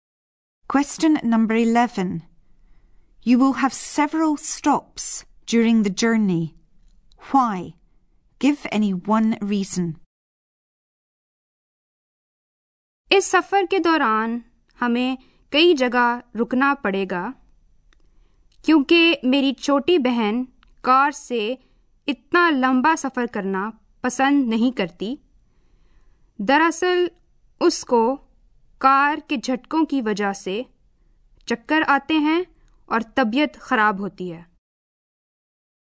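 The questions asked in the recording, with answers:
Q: Why? Give any one reason.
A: Her little sister doesn't like long car journeys; the car's jolting makes her dizzy and ill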